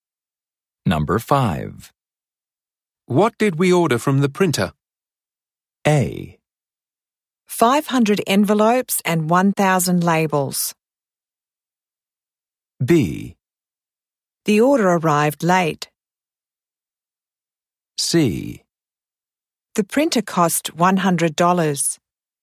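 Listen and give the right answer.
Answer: A: 500 envelopes and 1,000 labels.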